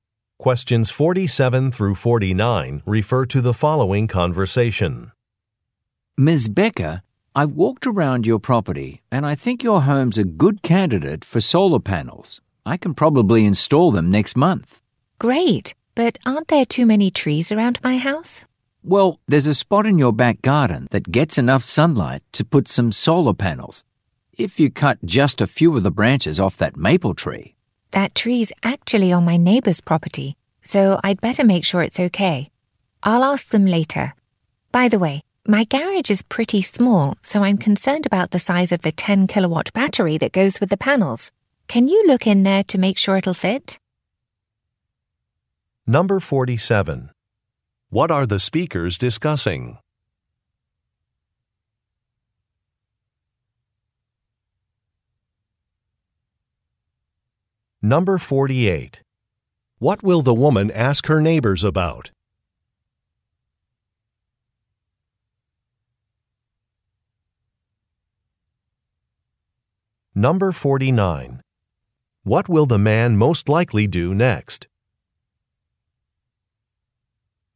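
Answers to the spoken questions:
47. Installing solar panels
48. Cutting branches off their tree
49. Check the garage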